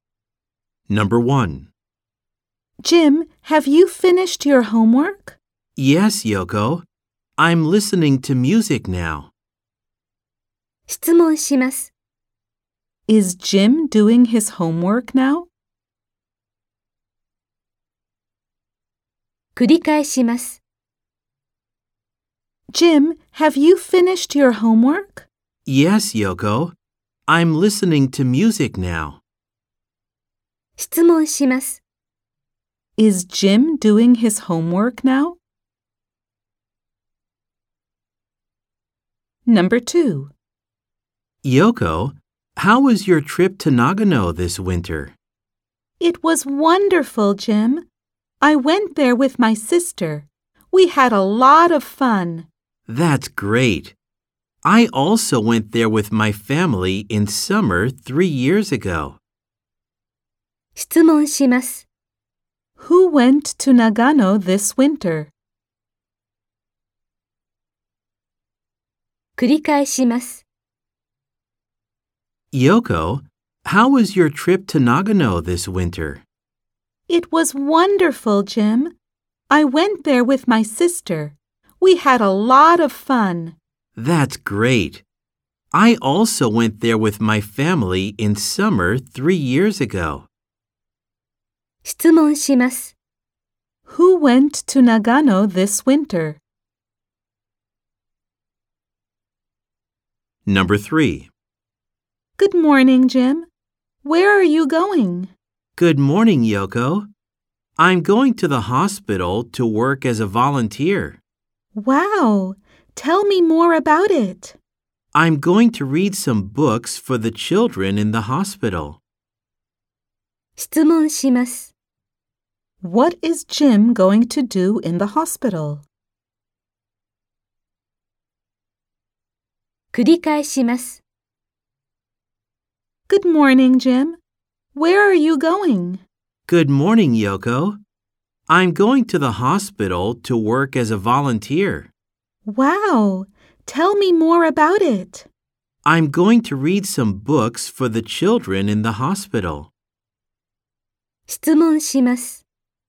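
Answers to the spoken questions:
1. No, he isn't.
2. Yoko and her sister
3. Read some books for the children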